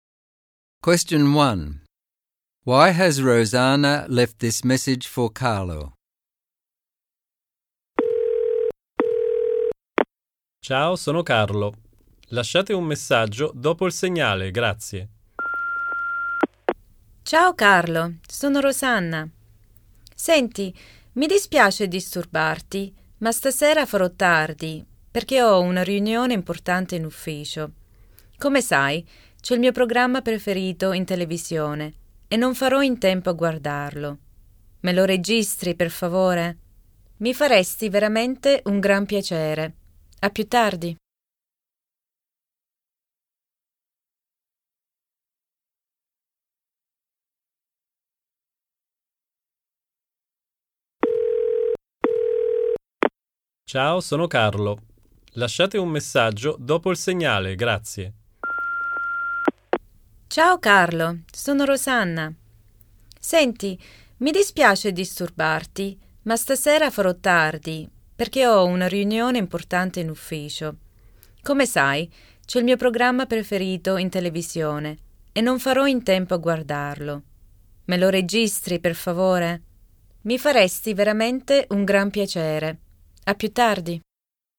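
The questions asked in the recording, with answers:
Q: Why has Rosanna left this message for Carlo?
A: She will be late because of an important work meeting and wants Carlo to record her favourite TV programme.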